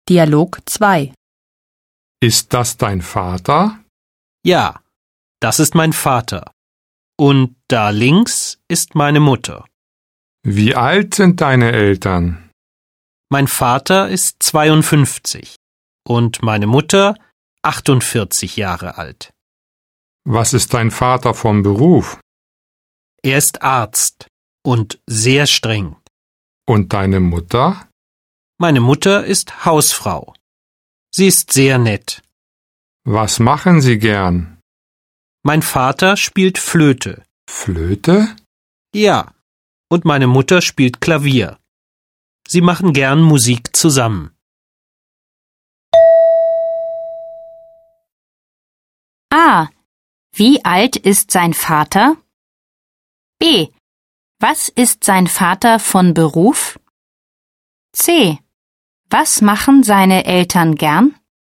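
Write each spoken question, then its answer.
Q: Wie alt ist sein Vater?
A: 52 Jahre alt

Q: Was ist sein Vater von Beruf?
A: Arzt

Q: Was machen seine Eltern gern?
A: Sie machen gern Musik zusammen (Flöte und Klavier).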